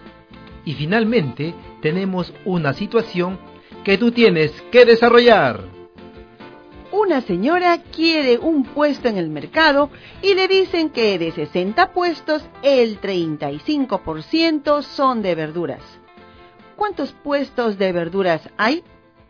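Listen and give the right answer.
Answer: 21 puestos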